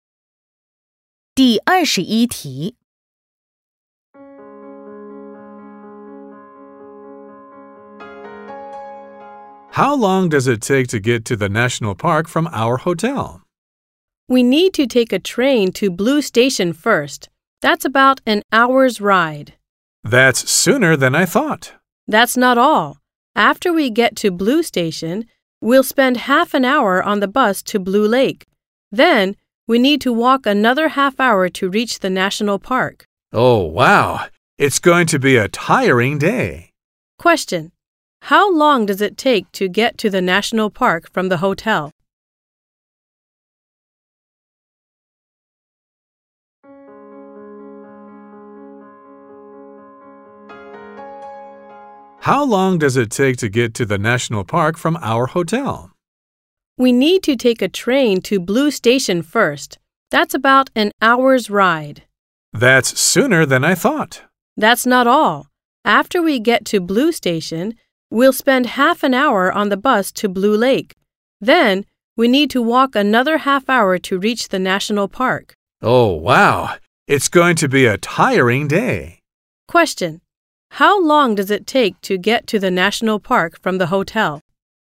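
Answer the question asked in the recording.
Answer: Two hours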